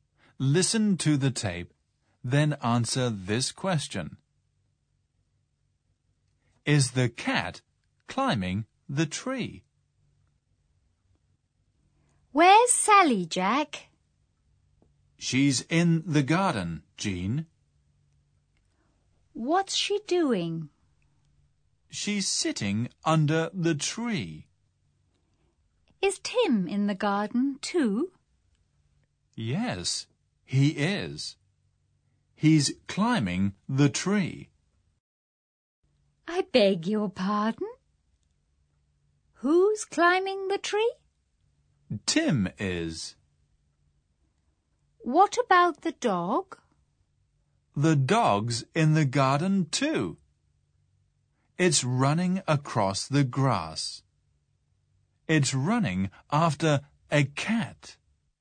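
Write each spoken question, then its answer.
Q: Is the cat climbing the tree?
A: No, it isn't. Tim is climbing the tree; the dog is running after the cat.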